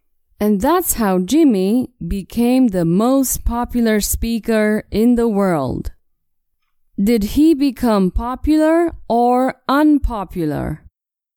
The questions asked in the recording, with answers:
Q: Did he become popular or unpopular?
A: Not unpopular. He became the most popular speaker.